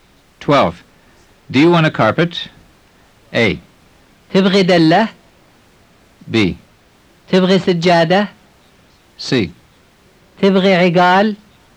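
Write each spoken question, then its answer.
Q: Do you want a carpet?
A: B: تبغي سجادة؟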